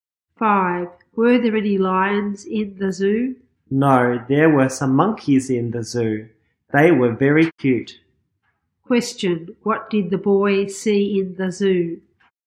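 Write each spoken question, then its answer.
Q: what did the boy see in the zoo?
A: Some monkeys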